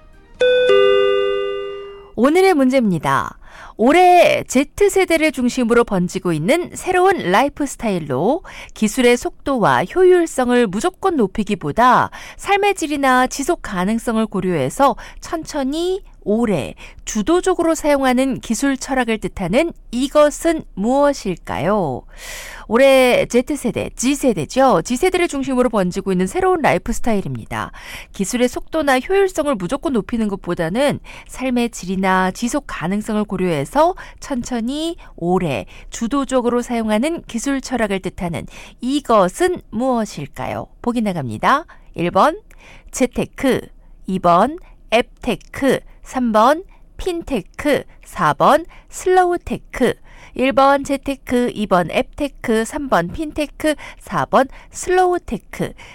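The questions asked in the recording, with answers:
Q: 올해 Z세대를 중심으로 번지고 있는 새로운 라이프 스타일로 기술의 속도와 효율성을 무조건 높이기보다 삶의 질이나 지속 가능성을 고려해서 천천히 오래 주도적으로 사용하는 기술 철학을 뜻하는 이것은 무엇일까요?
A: 4: 슬로우테크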